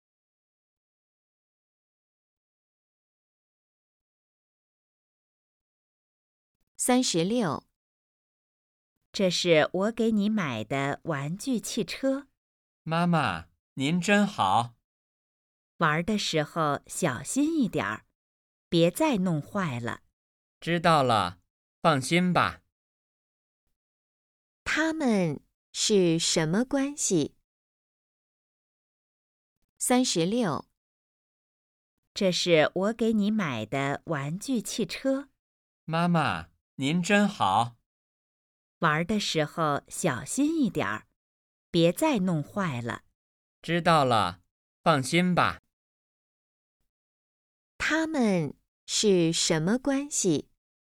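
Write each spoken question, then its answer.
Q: 他们是什么关系?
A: 母子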